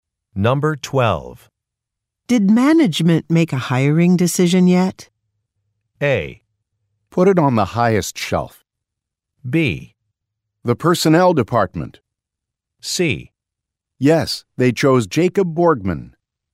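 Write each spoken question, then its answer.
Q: Did management make a hiring decision yet?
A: C: Yes, they chose Jacob Borgman.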